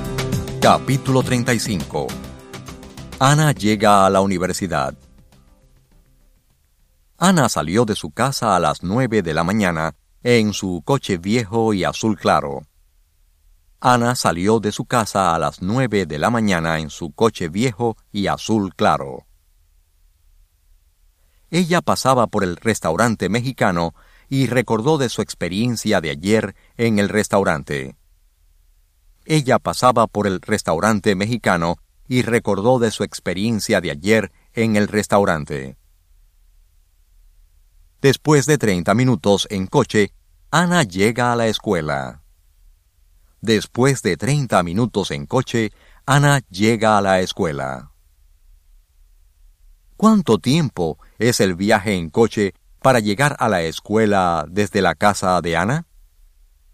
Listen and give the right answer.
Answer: El viaje en coche para llegar a la escuela desde la casa de Ana requiere 30 minutos.